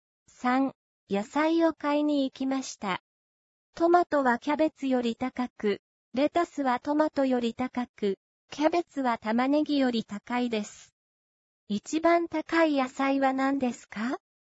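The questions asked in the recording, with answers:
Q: 一番高い野菜は何ですか?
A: レタス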